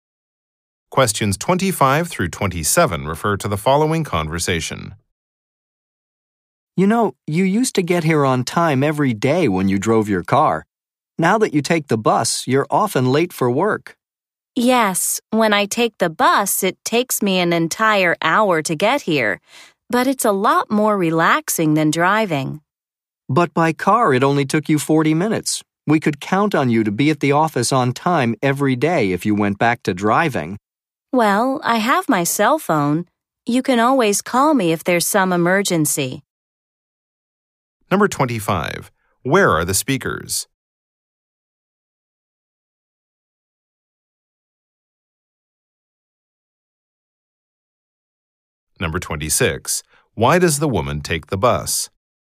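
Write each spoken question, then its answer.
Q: Where are the speakers?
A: At the office

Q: Why does the woman take the bus?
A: It's more relaxing than driving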